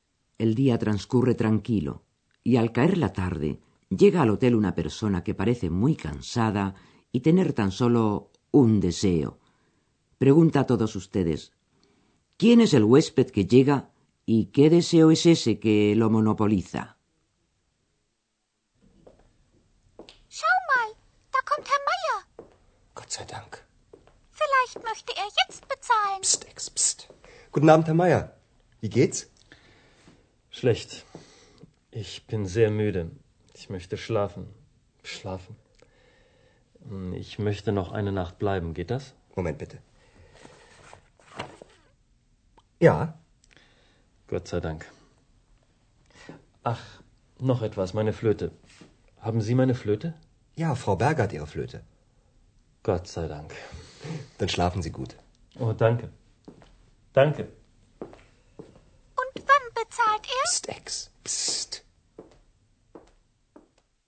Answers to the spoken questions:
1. Es el señor Mayer el que ha regresado al Hotel Europa
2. su único deseo por el momento es el de dormir.